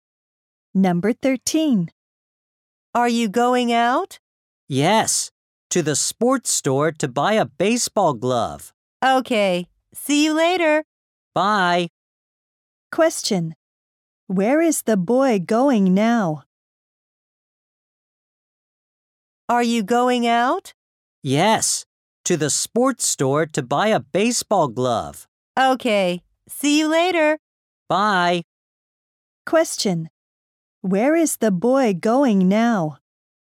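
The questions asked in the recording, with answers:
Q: Where is the boy going now?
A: To the sports store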